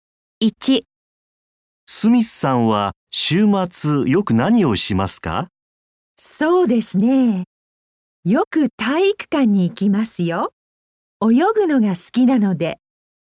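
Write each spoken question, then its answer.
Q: スミスさんは週末よく何をしますか?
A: 体育館で泳ぎます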